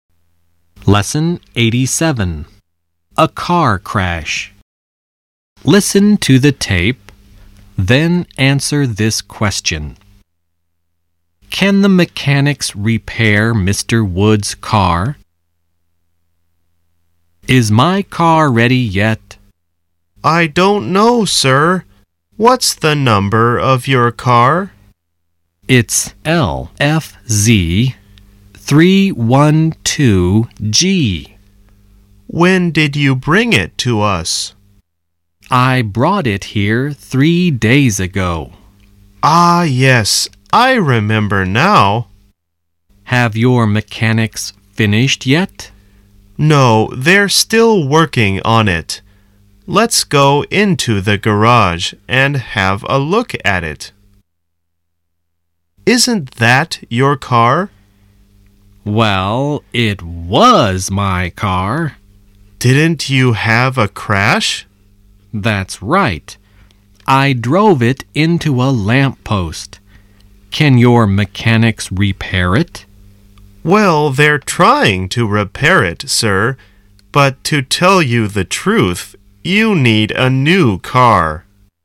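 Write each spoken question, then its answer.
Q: Can the mechanics repair Mr. Wood's car?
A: No, probably not; they're trying, but he needs a new car.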